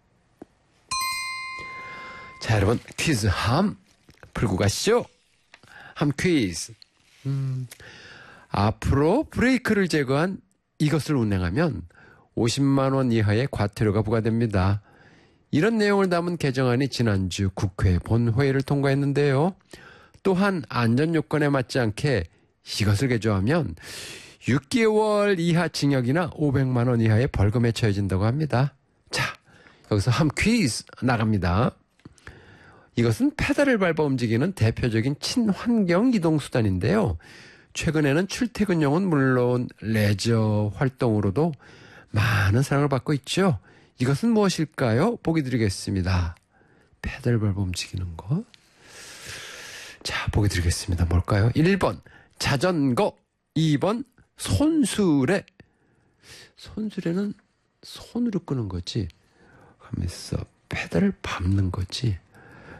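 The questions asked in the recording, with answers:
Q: 이것은 무엇일까요?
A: 1번: 자전거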